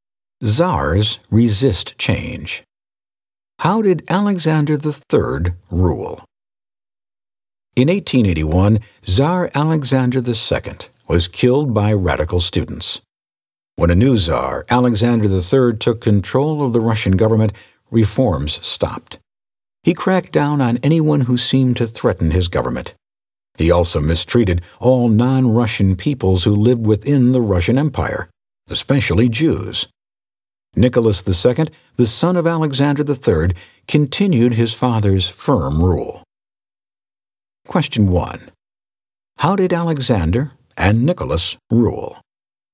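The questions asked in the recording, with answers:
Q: How did Alexander and Nicholas rule?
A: Firmly; they stopped reforms and cracked down on anyone who seemed to threaten the government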